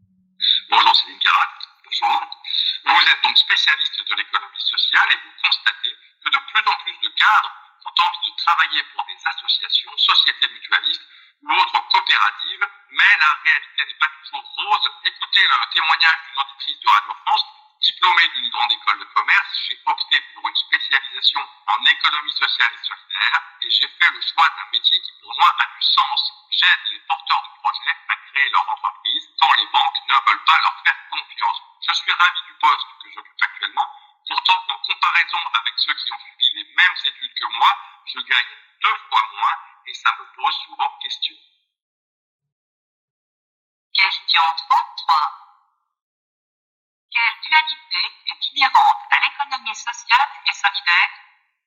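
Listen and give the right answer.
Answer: Un métier qui a du sens, mais un salaire deux fois moins élevé.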